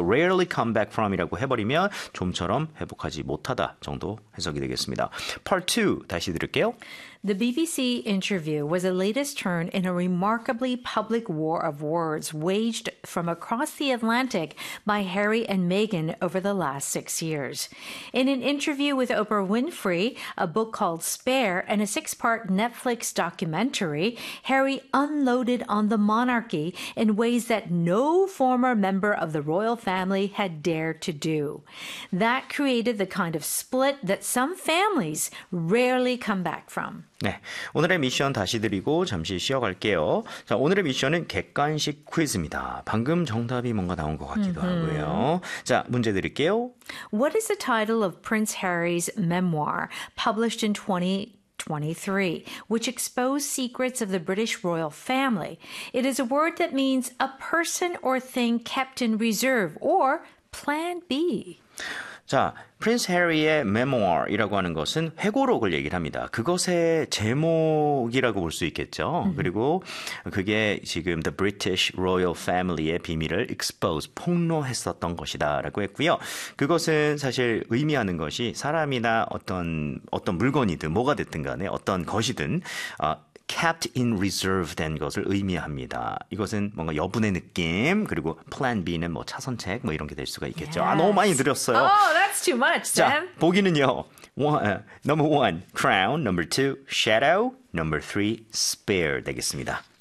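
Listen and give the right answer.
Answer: 3: spare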